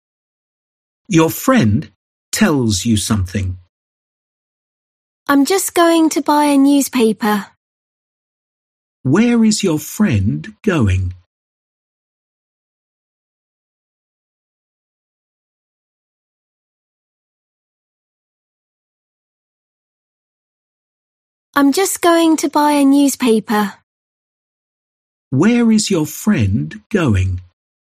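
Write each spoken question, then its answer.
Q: Where is your friend going?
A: To buy a newspaper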